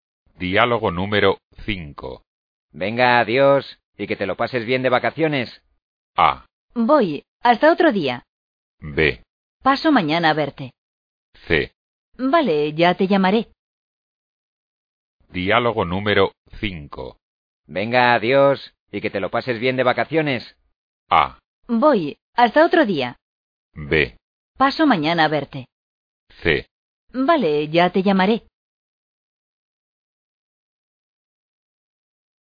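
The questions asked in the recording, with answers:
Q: Venga, adiós, y que te lo pases bien de vacaciones.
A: C: Vale, ya te llamaré.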